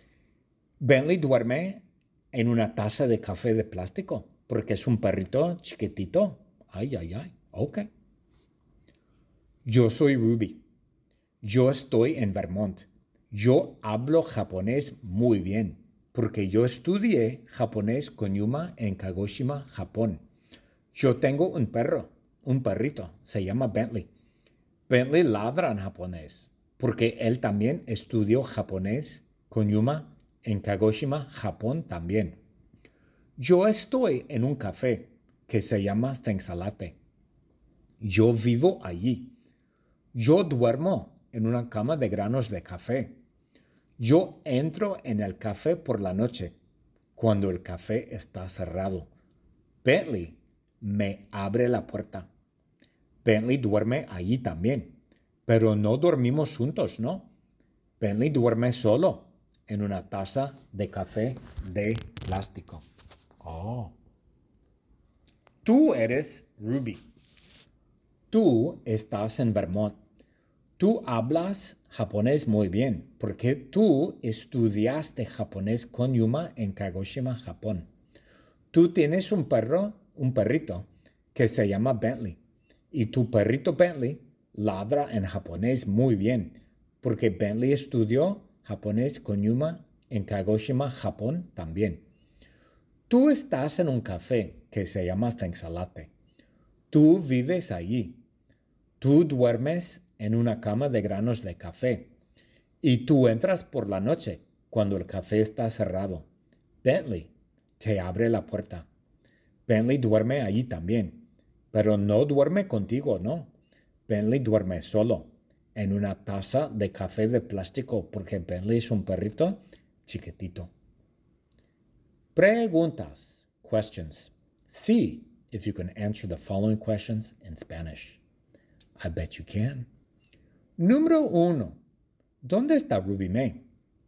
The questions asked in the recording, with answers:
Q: ¿dónde está Ruby Mae?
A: Ruby Mae está en Vermont.